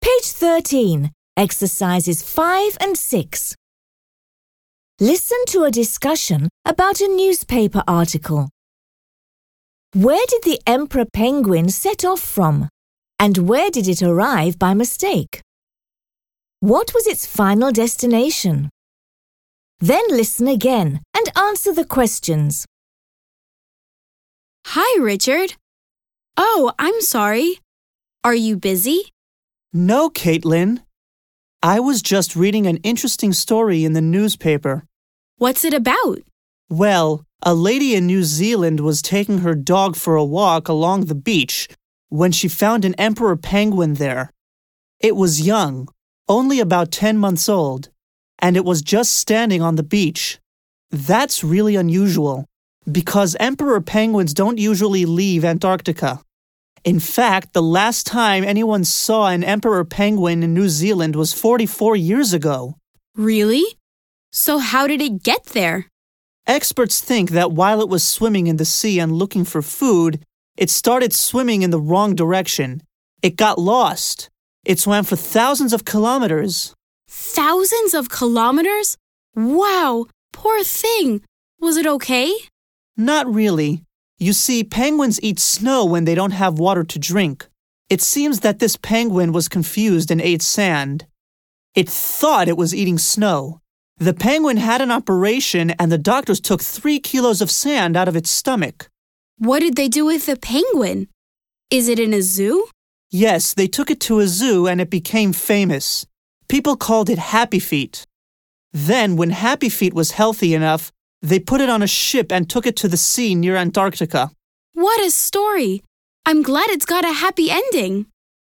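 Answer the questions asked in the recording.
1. Antarctica
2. New Zealand
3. The sea near Antarctica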